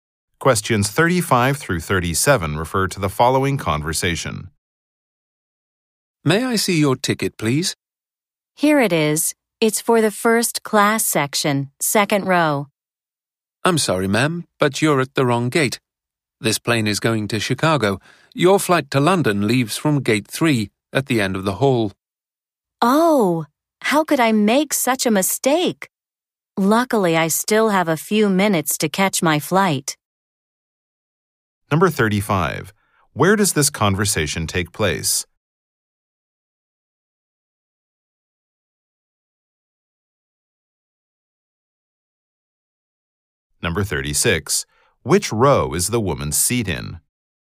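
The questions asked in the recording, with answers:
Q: Where does this conversation take place?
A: At an airport gate

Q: Which row is the woman's seat in?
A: The second row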